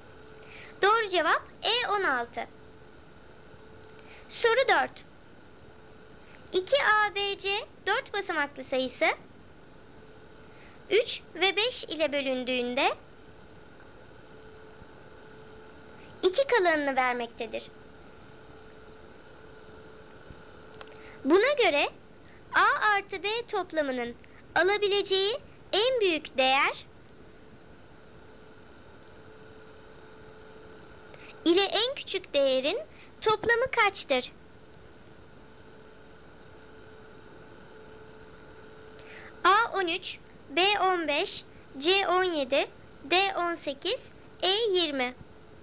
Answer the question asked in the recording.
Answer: Doğru cevap D18.